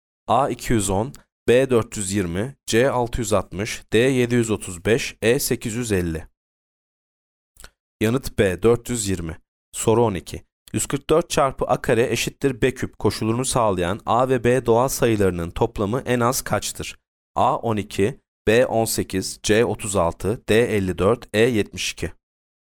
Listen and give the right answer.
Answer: Yanıt D 54.